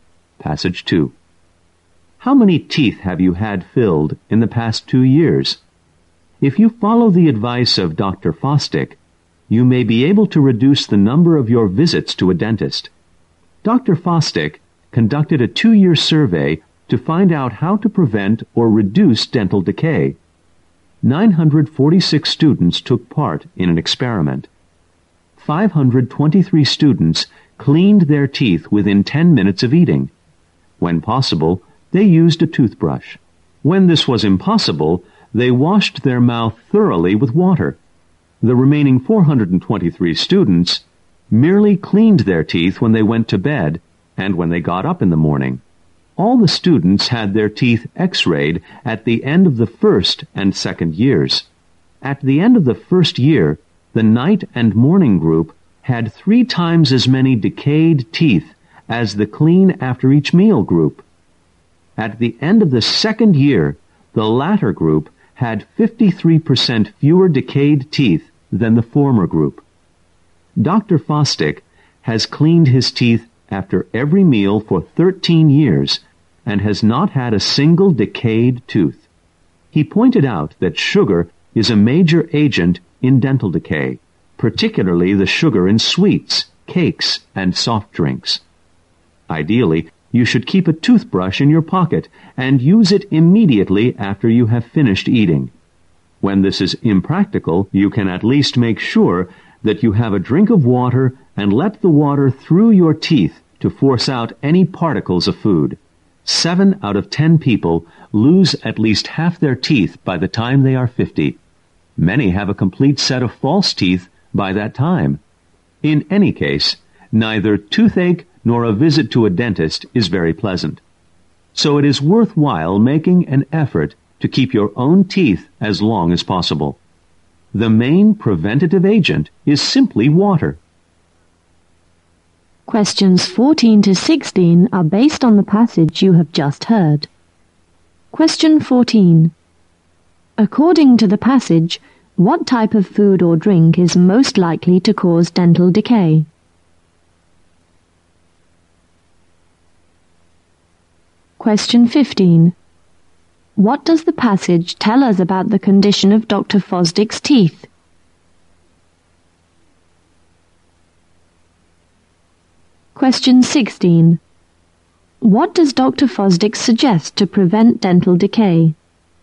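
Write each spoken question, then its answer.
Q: According to the passage, what type of food or drink is most likely to cause dental decay?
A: Sugary food and drinks such as sweets, cakes and soft drinks

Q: What does the passage tell us about the condition of Dr.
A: He hasn't had a single decayed tooth in 13 years.

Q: What does Dr. Fosdick suggest to prevent dental decay?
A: Clean your teeth right after eating, or at least rinse with water.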